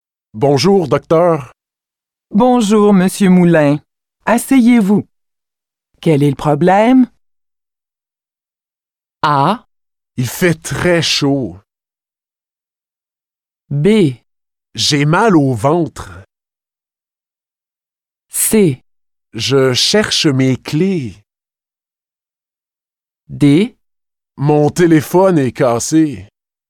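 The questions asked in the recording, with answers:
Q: Quel est le problème?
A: B: J'ai mal au ventre.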